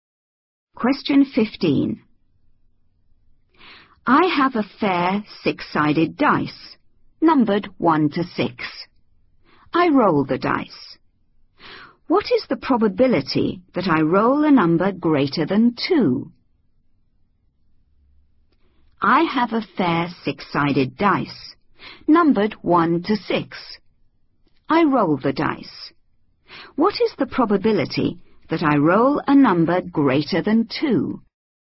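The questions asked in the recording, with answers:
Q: I roll the dice. What is the probability that I roll a number greater than 2?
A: 2/3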